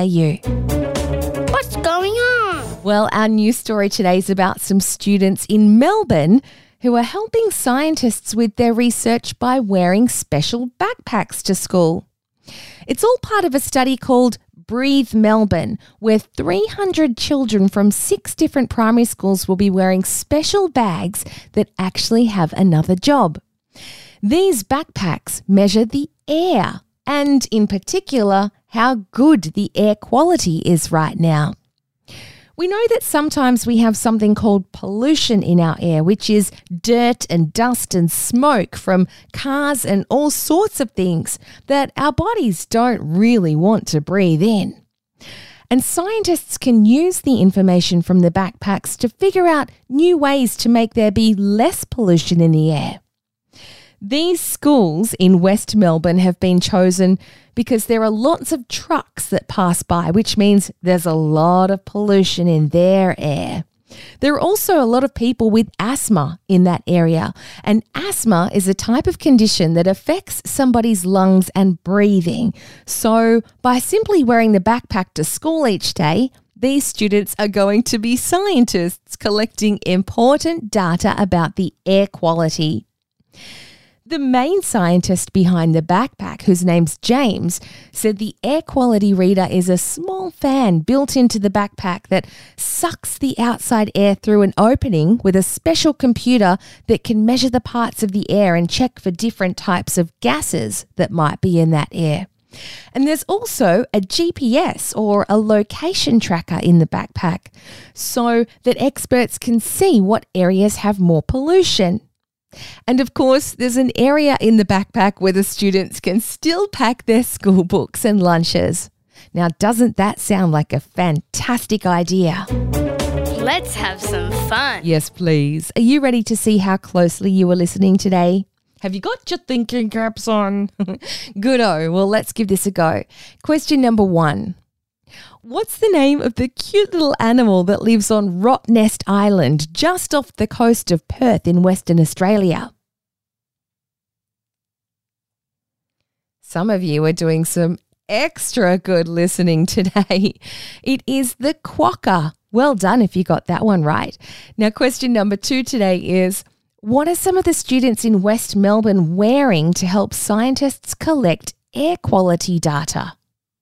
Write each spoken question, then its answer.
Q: what are some of the students in West Melbourne wearing to help scientists collect air quality data?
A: I think almost all of you said backpacks.